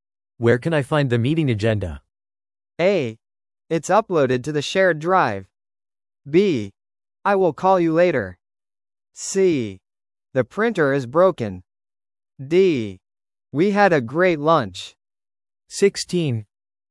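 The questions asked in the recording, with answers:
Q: Where can I find the meeting agenda?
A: A: It's uploaded to the shared drive.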